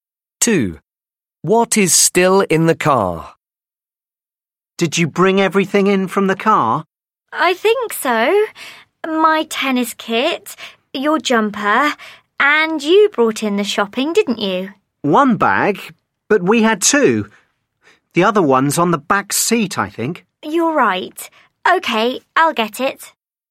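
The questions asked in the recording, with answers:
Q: What is still in the car?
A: a shopping bag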